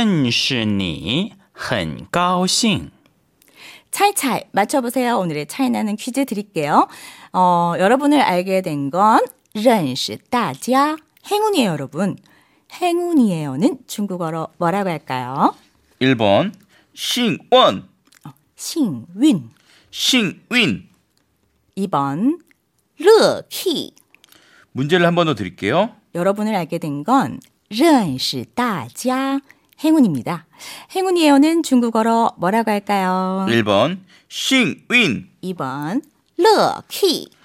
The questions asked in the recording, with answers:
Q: 행운이에요는 중국어로 뭐라고 할까요?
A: 정답은요. 1번 싱윈입니다.